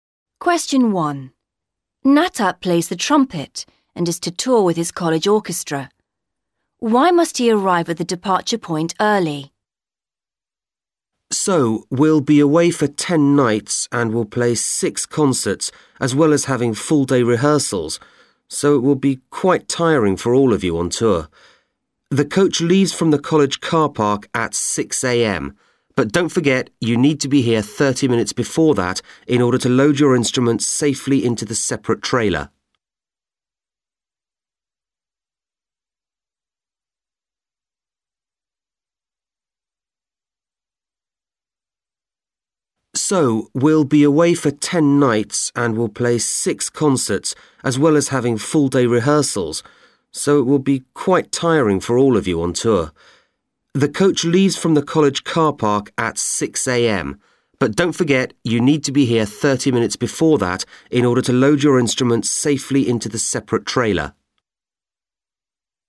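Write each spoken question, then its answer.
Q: Why must he arrive at the departure point early?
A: To load the instruments safely into the separate trailer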